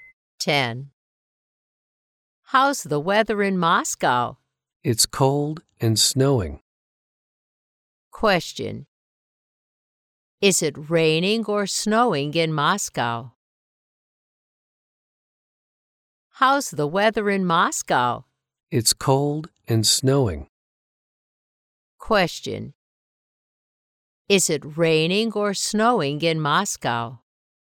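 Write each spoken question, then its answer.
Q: Is it raining or snowing in Moscow?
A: It's snowing.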